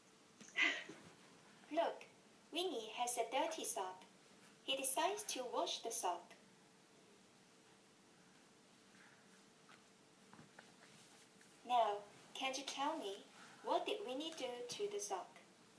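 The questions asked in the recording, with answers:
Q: Now, can you tell me, what did Winnie do to the sock?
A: He washed the sock.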